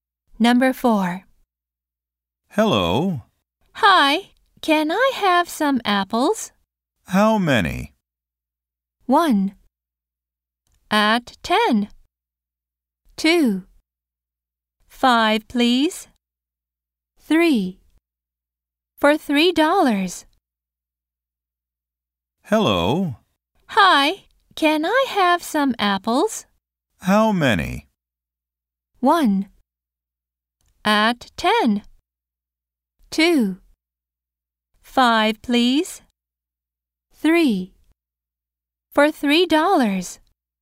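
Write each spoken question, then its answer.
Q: How many?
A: 2: 5, please.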